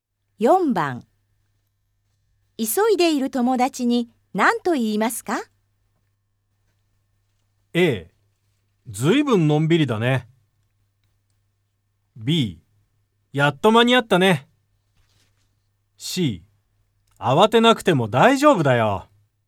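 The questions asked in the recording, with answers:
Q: 急いでいる友達に何と言いますか?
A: C: 慌てなくても大丈夫だよ。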